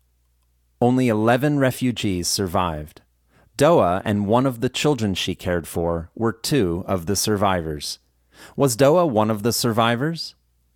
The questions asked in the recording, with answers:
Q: Was Doa one of the survivors?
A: Yes, Doa was one of the survivors.